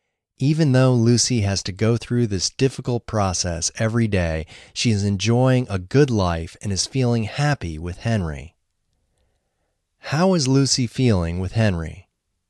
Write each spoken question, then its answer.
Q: How is Lucy feeling with Henry?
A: She is feeling happy with Henry.